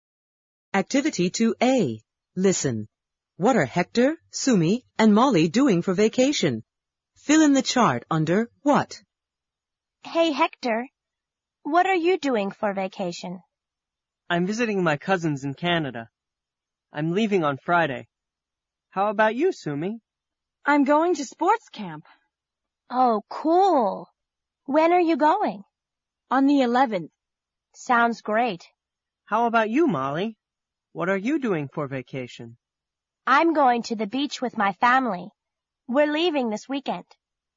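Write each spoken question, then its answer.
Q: What are Hector, Sumi, and Molly doing for vacation?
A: Hector is visiting his cousins in Canada, Sumi is going to sports camp, and Molly is going to the beach with her family.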